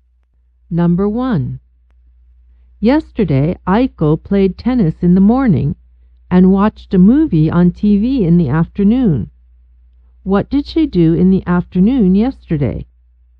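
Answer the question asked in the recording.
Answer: She watched a movie on TV.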